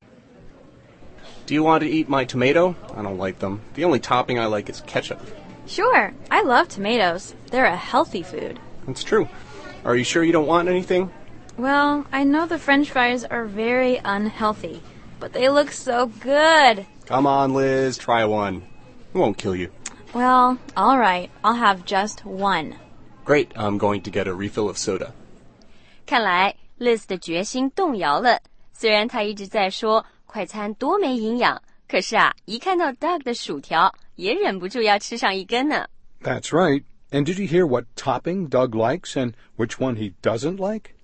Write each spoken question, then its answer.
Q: And did you hear what topping Doug likes and which one he doesn't like?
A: Doug 说在汉堡的所有佐料里啊,他只喜欢 ketchup, 番茄酱,还说他不爱吃番茄。